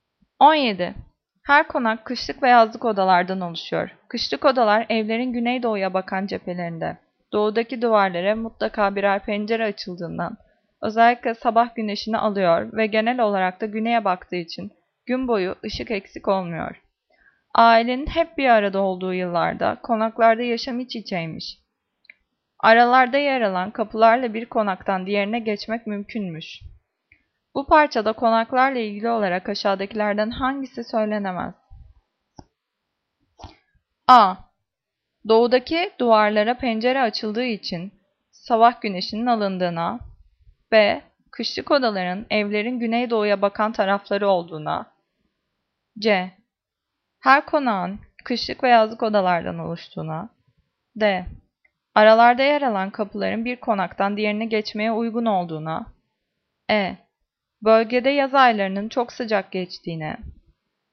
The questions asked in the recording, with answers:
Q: Bu parçada konaklarla ilgili olarak aşağıdakilerden hangisi söylenemez?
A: Cevap E. Bölgede yaz aylarının çok sıcak geçtiğine.